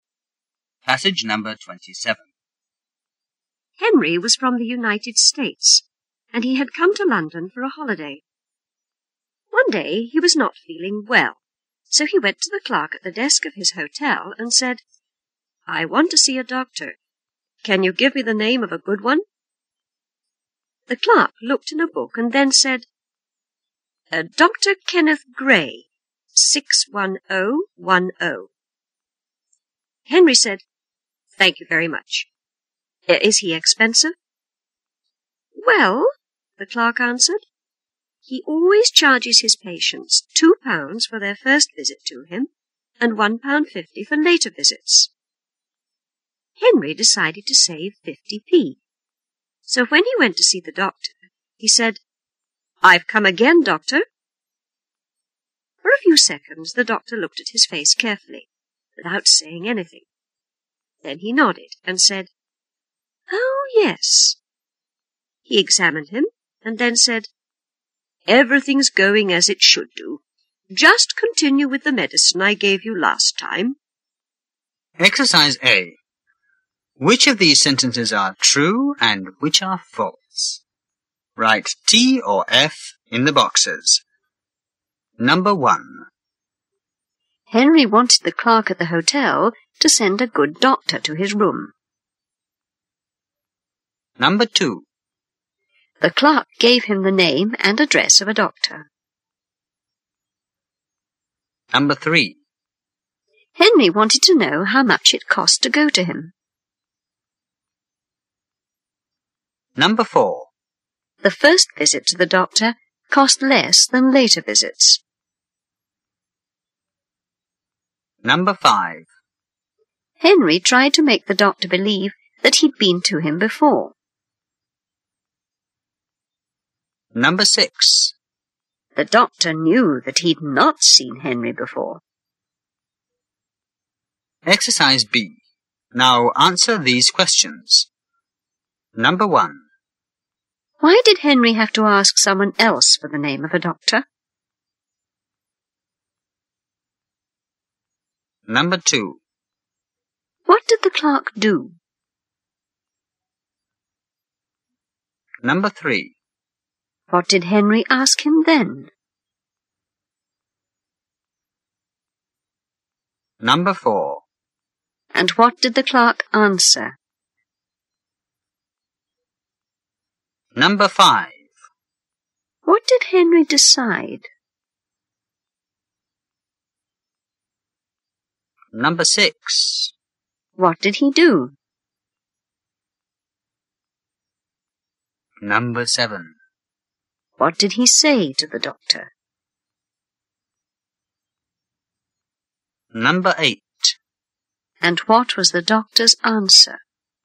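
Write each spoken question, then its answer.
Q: Henry wanted the clerk at the hotel to send a good doctor to his room.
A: False

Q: The clerk gave him the name and address of a doctor.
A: False

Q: Henry wanted to know how much it cost to go to him.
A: True

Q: The first visit to the doctor cost less than later visits.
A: False

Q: Henry tried to make the doctor believe that he'd been to him before.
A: True

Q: Why did Henry have to ask someone else for the name of a doctor?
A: He was from the United States, on holiday in London, and didn't know any doctors there.

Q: What did the clerk do?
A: He looked in a book and gave him the name and number of Dr. Kenneth Gray.

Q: What did Henry ask him then?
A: Whether the doctor was expensive.

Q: And what did the clerk answer?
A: He charges £2 for the first visit and £1.50 for later visits.

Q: What did Henry decide?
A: To save 50p.

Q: What did he do?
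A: He pretended he had been to the doctor before.

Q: What did he say to the doctor?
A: "I've come again, doctor."

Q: And what was the doctor's answer?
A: Everything's going as it should; just continue with the medicine I gave you last time.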